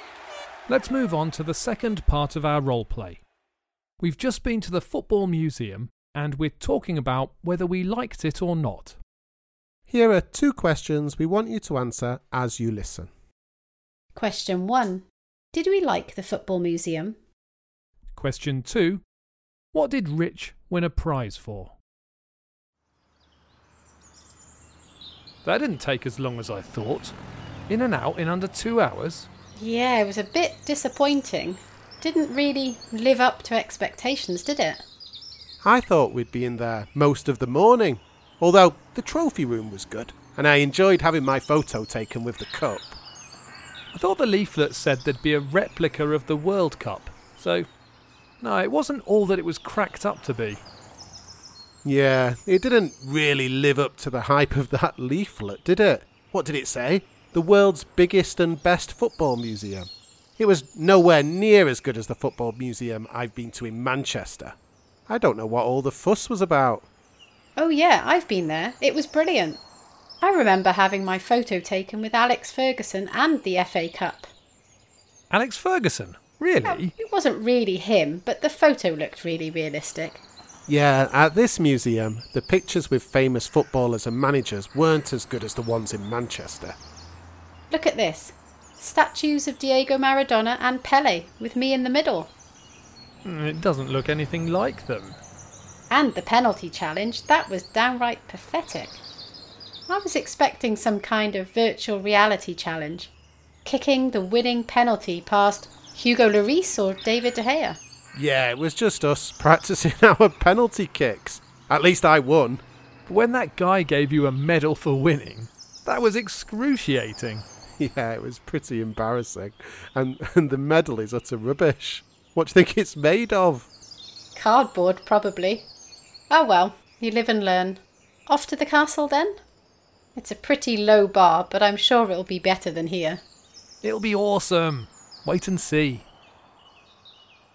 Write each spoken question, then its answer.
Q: Did we like the Football Museum?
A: The answer is no, none of us did.

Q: What did Rich win a prize for?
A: I won a prize for winning a <laughs> penalty shootout.